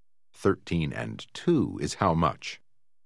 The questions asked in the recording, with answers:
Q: 13 and 2 is how much?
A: 15.